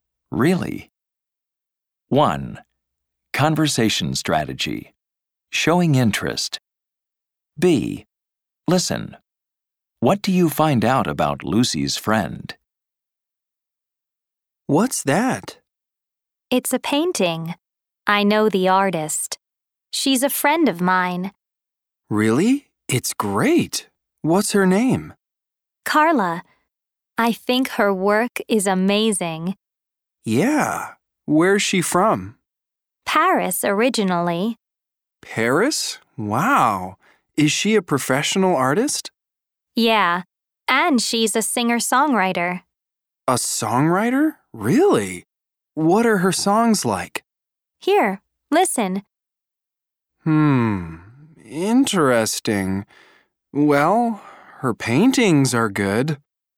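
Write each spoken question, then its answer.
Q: What do you find out about Lucy's friend?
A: Her name is Carla. She's from Paris, and she's a professional artist and a singer-songwriter.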